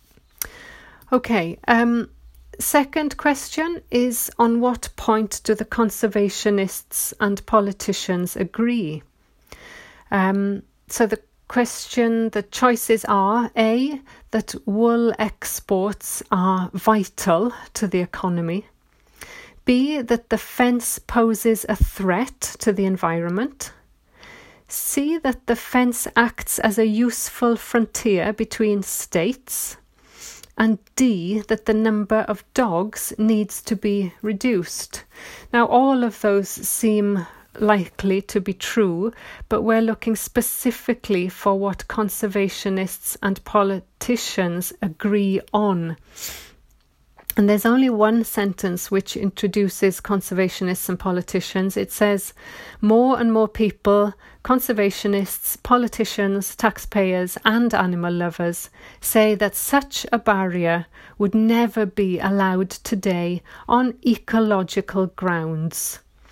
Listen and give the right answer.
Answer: So the answer for number two is B.